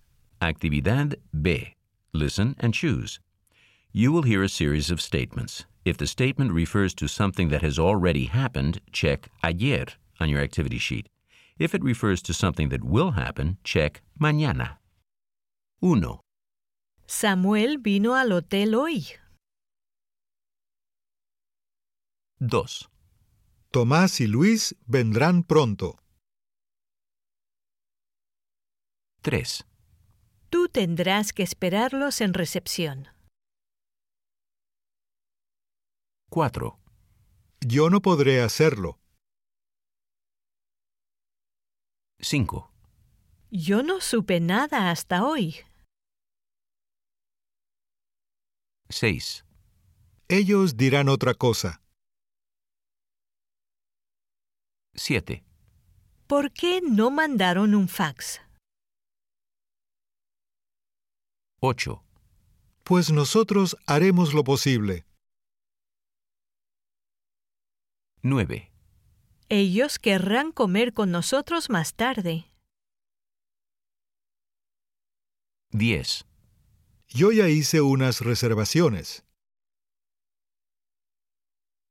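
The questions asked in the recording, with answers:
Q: Samuel vino al hotel hoy.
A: ayer

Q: Tomás y Luis vendrán pronto.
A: mañana

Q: Tú tendrás que esperarlos en recepción.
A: mañana

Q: Yo no podré hacerlo.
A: mañana

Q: Yo no supe nada hasta hoy.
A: ayer

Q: Ellos dirán otra cosa.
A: mañana

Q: ¿Por qué no mandaron un fax?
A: ayer

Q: Pues nosotros haremos lo posible.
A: mañana

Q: Ellos querrán comer con nosotros más tarde.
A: mañana

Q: Yo ya hice unas reservaciones.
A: ayer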